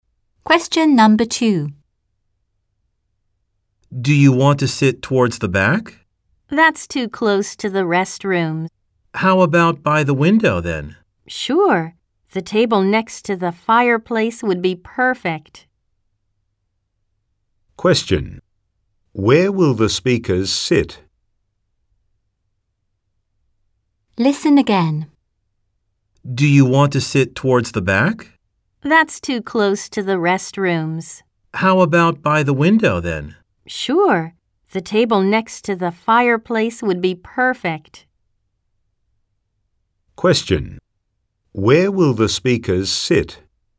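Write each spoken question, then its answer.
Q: Where will the speakers sit?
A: By the window, at the table next to the fireplace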